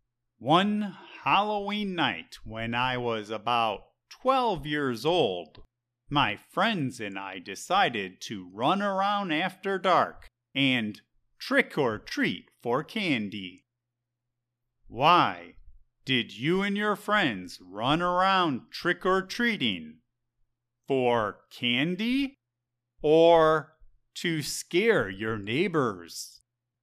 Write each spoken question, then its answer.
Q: Why did you and your friends run around trick-or-treating? For candy? Or to scare your neighbors?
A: It was Halloween, so we were trick-or-treating for candy.